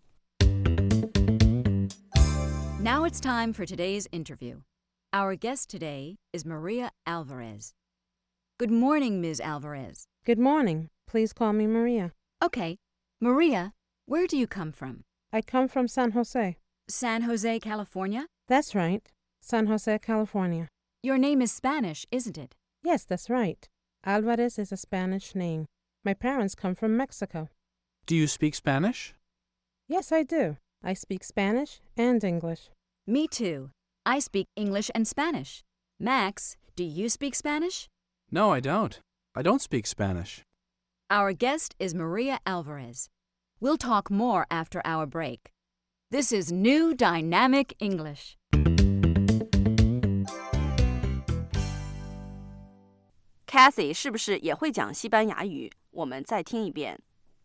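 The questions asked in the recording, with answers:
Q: Kathy 是不是也会讲西班牙语?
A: 会,她会说英语和西班牙语。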